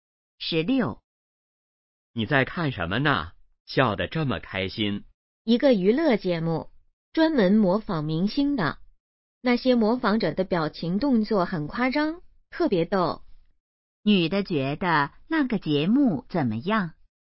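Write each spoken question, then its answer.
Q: 女的觉得那个节目怎么样?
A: 很逗,很好笑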